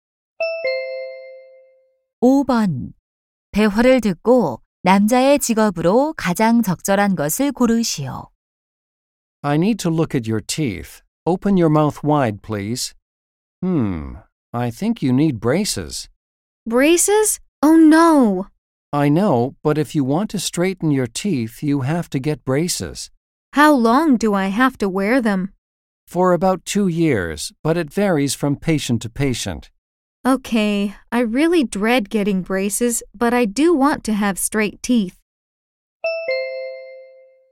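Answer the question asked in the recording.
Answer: 치과 의사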